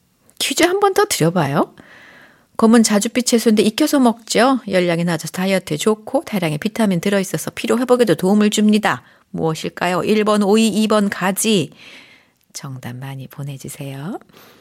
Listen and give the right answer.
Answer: 오늘의 정답은 2번 가지였습니다.